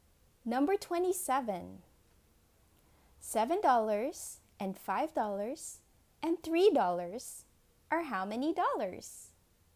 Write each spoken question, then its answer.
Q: $7 and $5 and $3 are how many dollars?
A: The answer is $15.